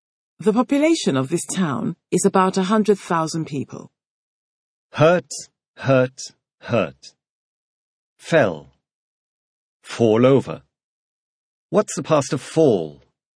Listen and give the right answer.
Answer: The past of fall is fell.